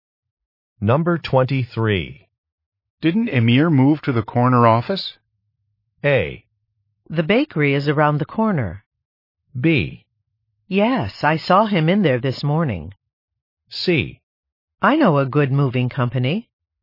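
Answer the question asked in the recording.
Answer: B: Yes, I saw him in there this morning.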